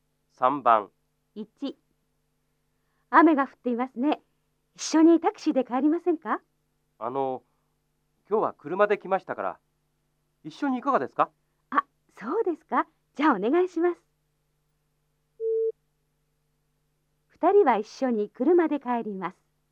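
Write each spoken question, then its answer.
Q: 二人は一緒に車で帰ります。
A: ○(正しい)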